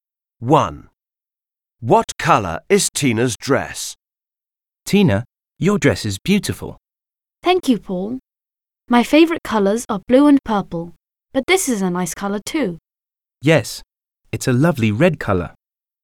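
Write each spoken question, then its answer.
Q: What colour is Tina's dress?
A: red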